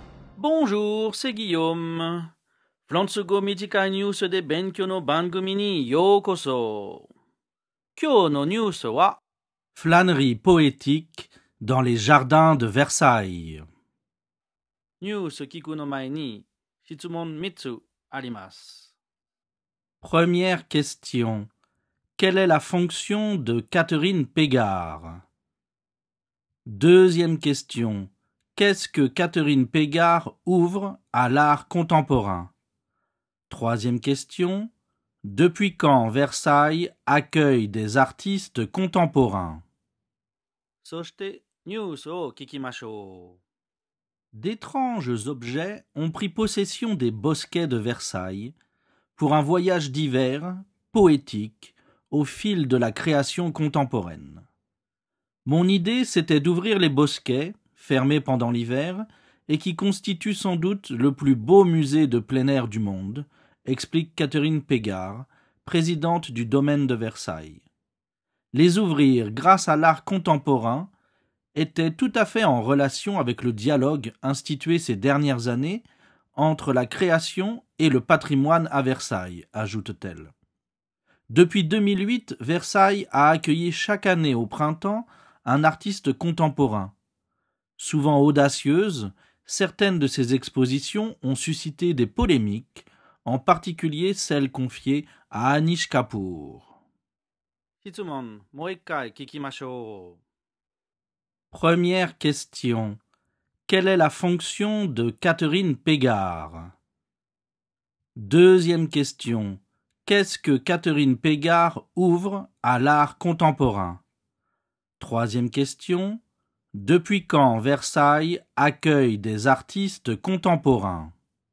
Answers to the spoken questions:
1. Catherine Pégard est présidente du domaine de Versailles.
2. Elle a ouvert les bosquets à l'art contemporain.
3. Versailles accueille des artistes contemporains depuis 2008.